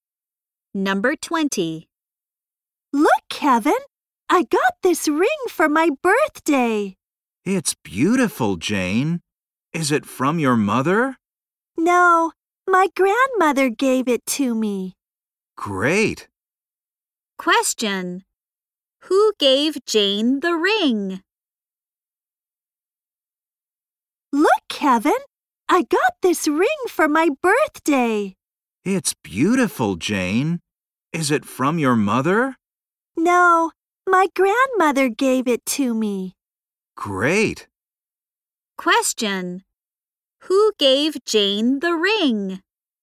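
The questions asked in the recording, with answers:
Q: Who gave Jane the ring?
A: Her grandmother.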